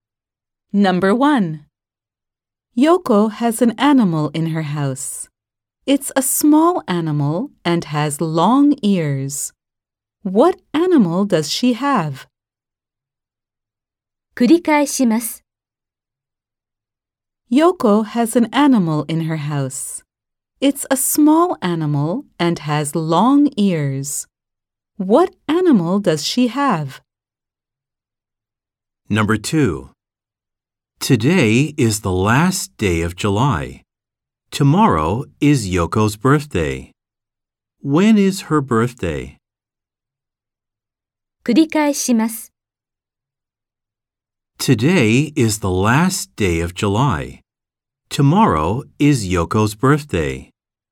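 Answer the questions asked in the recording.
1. A rabbit
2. August 1st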